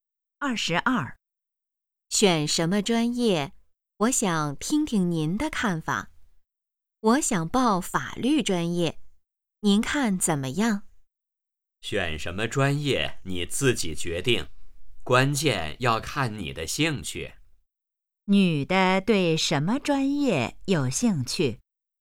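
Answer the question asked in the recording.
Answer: 法律专业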